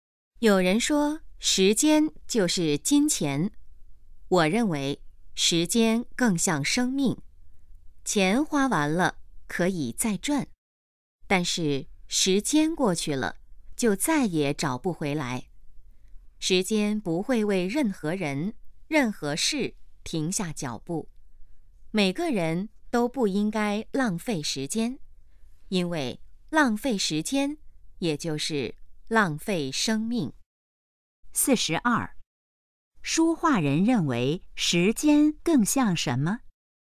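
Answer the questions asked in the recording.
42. 生命
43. 不要浪费时间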